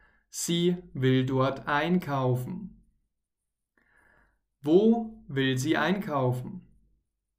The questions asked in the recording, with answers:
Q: Wo will sie einkaufen?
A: Im Supermarkt natürlich. Sie will oder möchte im Supermarkt einkaufen.